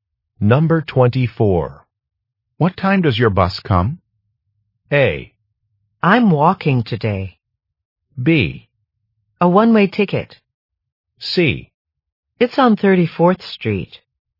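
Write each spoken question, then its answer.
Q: What time does your bus come?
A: A: I'm walking today.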